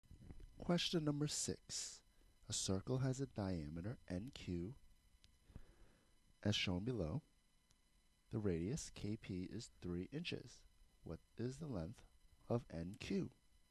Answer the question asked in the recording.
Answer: So knowing that the length of the radius is 3, we will multiply by 2 and get 6 inches.